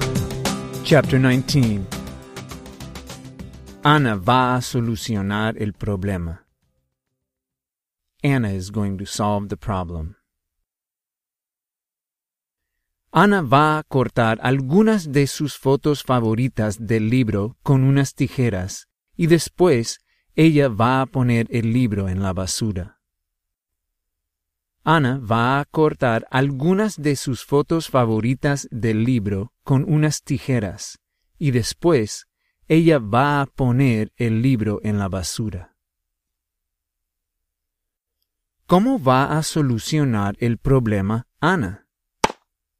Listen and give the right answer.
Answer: Para solucionar el problema, Ana va a cortar sus fotos favoritas del libro con unas tijeras y después ella va a poner el libro en la basura.